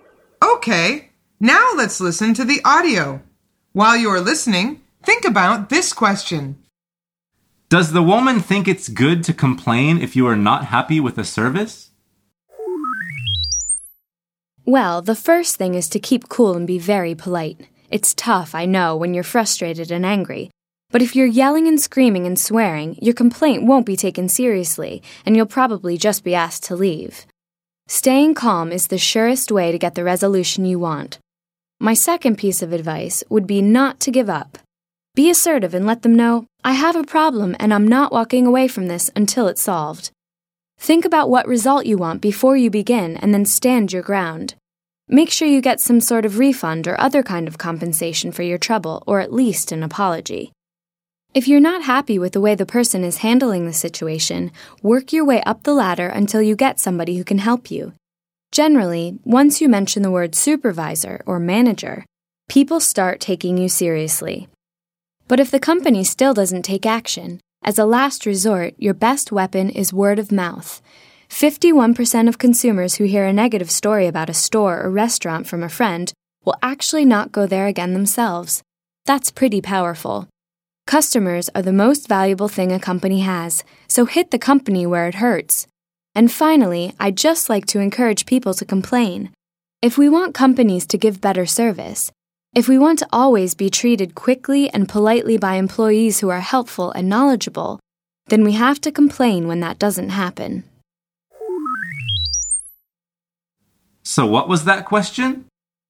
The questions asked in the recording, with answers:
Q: Does the woman think it's good to complain if you are not happy with a service?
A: The answer is yes.